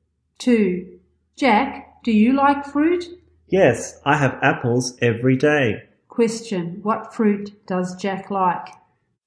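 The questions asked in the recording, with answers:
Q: What fruit does Jack like?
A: Apples.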